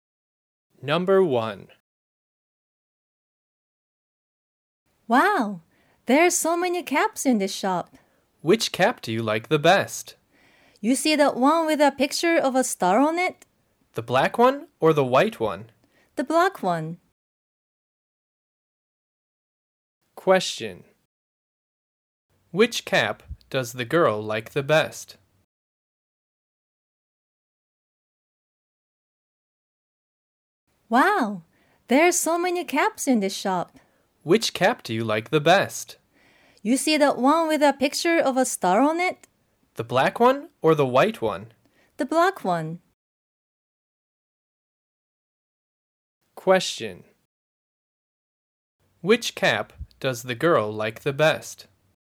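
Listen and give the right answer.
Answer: The black cap with a picture of a star on it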